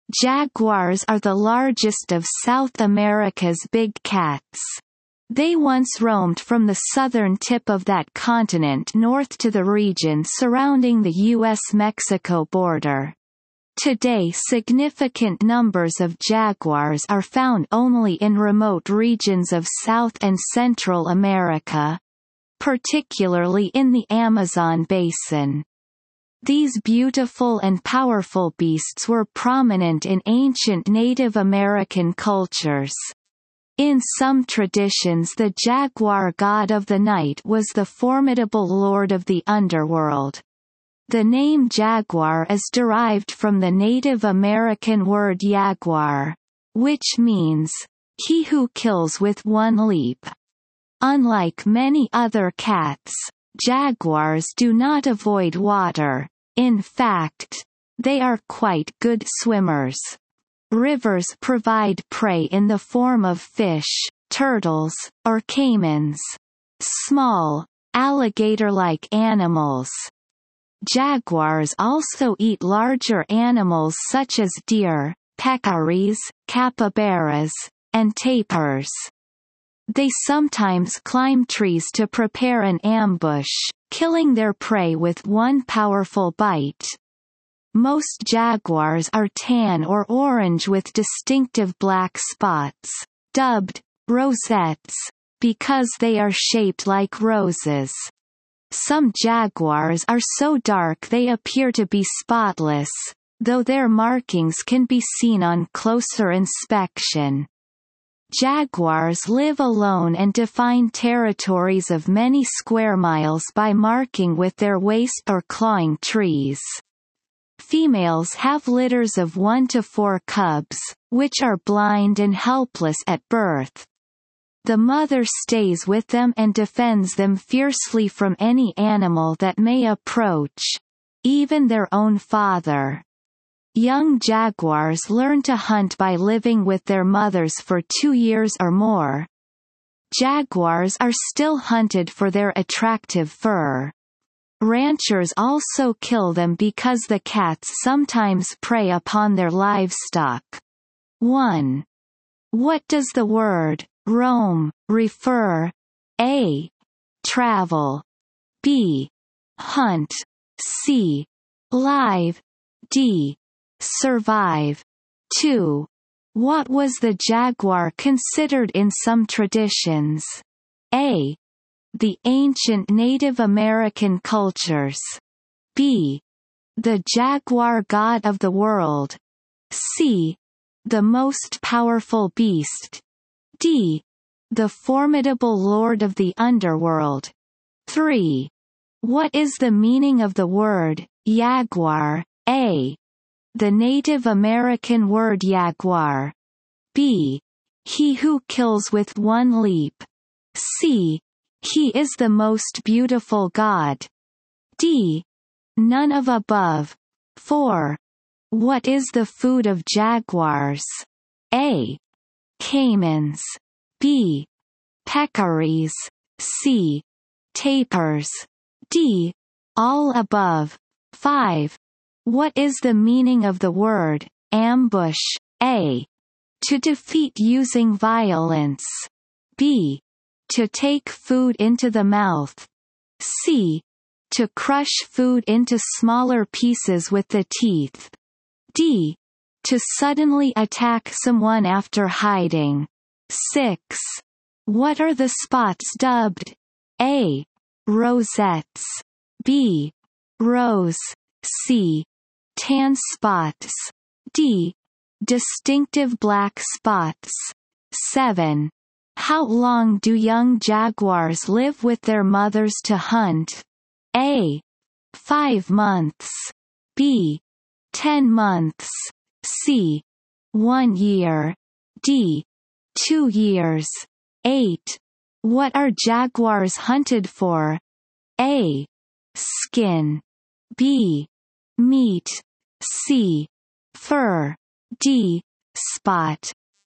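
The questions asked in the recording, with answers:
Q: What does the word roam refer?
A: A: Travel.

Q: What was the jaguar considered in some traditions?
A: D: The formidable lord of the underworld.

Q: What is the meaning of the word jaguar?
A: B: He who kills with one leap.

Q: What is the food of jaguars?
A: D: All above.

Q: What is the meaning of the word ambush?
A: D: To suddenly attack someone after hiding.

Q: What are the spots dubbed?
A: A: Rosettes.

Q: How long do young jaguars live with their mothers to hunt?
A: D: 2 years.

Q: What are jaguars hunted for?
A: C: Fur.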